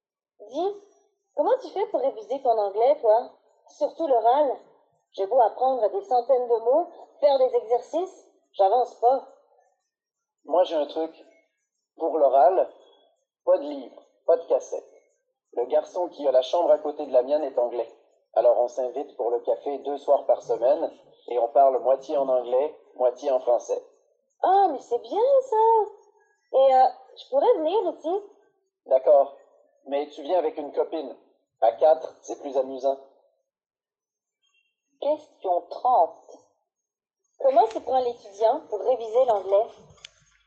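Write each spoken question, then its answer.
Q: Comment s'y prend l'étudiant pour réviser l'anglais?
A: Il parle avec son voisin de chambre anglais autour d'un café deux soirs par semaine, moitié en anglais, moitié en français.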